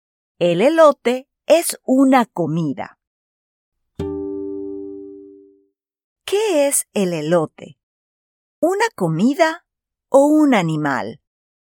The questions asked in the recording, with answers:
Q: ¿Qué es el elote? ¿Una comida o un animal?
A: Sí, muy bien. El elote no es un animal, es una comida.